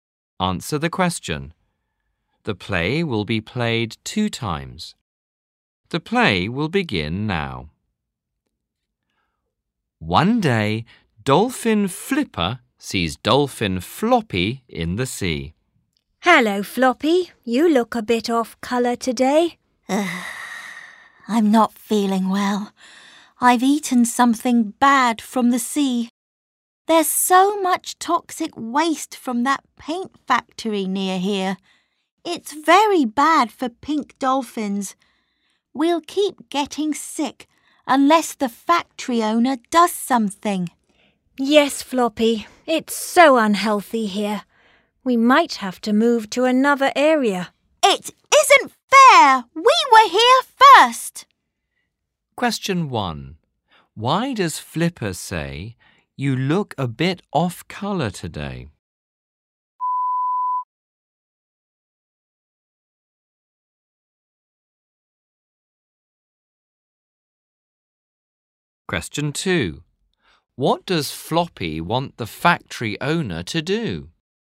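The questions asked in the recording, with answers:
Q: Why does Flipper say, "You look a bit off colour today"?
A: Because Floppy looks sick

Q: What does Floppy want the factory owner to do?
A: Do something about the toxic waste from the paint factory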